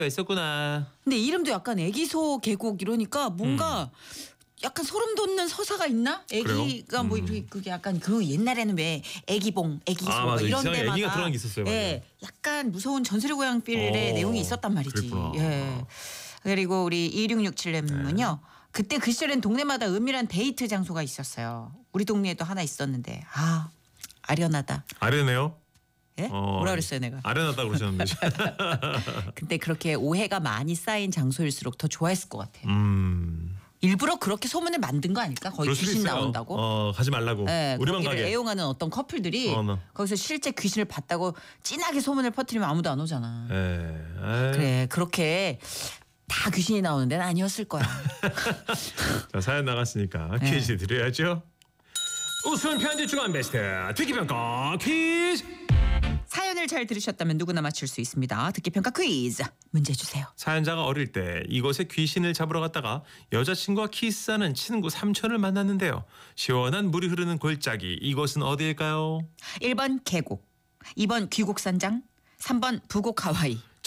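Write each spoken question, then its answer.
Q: 시원한 물이 흐르는 골짜기 이곳은 어디일까요?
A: 1번: 계곡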